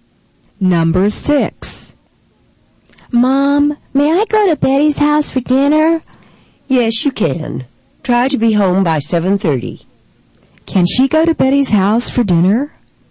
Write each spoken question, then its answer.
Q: Can she go to Betty's house for dinner?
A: The answer is yes. She can go to Betty's house for dinner.